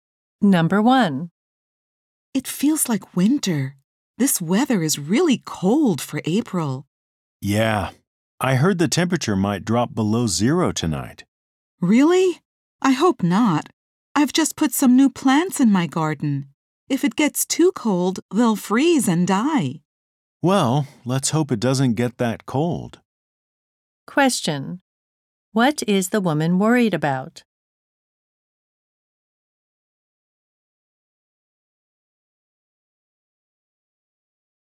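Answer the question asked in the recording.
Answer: Her new garden plants might freeze and die in the cold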